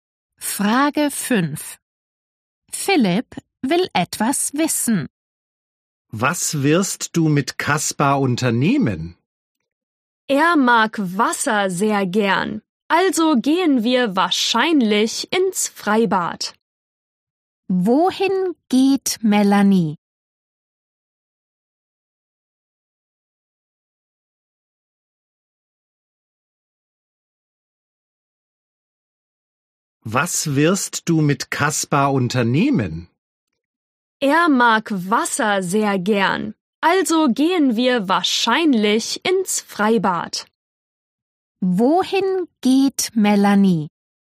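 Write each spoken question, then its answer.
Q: Wohin geht Melanie?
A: Ins Freibad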